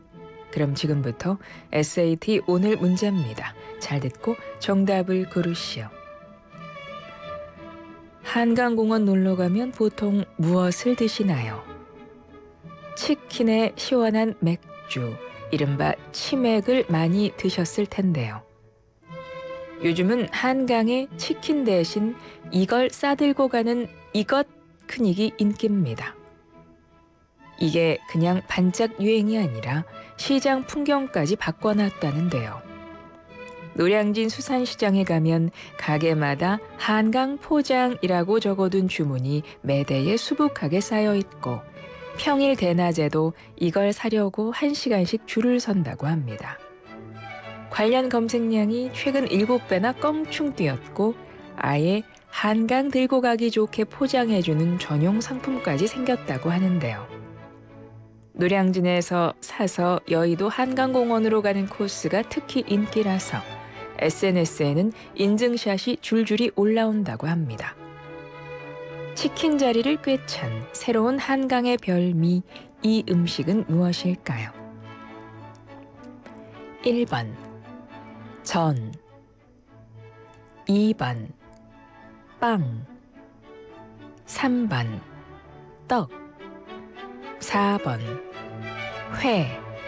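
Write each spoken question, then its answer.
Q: 치킨 자리를 꿰찬 새로운 한강의 별미, 이 음식은 무엇일까요?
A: 4번: 회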